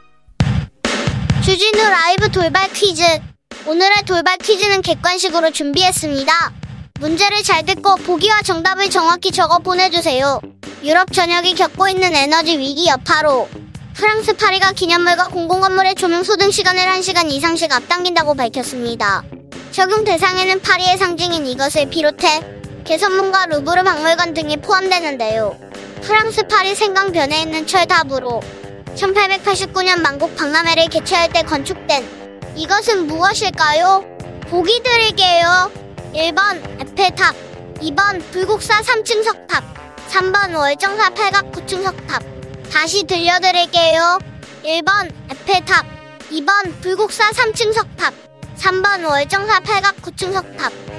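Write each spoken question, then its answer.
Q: 프랑스 파리 생강변에 있는 철탑으로 1889년 만국 박람회를 개최할 때 건축된 이것은 무엇일까요?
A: 1: 에펠탑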